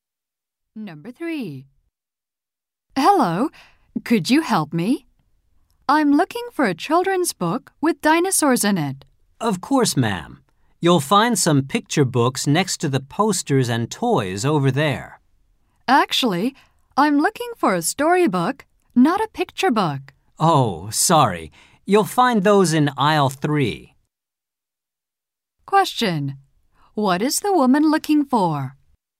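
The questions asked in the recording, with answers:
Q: What is the woman looking for?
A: A children's storybook with dinosaurs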